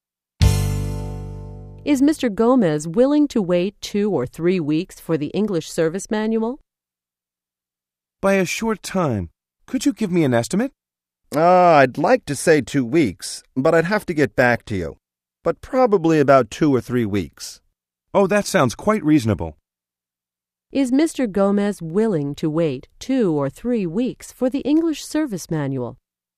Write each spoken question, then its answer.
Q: Is Mr. Gomez willing to wait 2 or 3 weeks for the English service manual?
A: Yes, he is. He says that sounds quite reasonable.